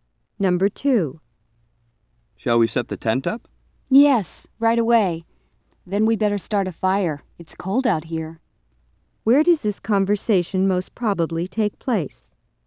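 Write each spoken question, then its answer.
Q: Where does this conversation most probably take place?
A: At a campsite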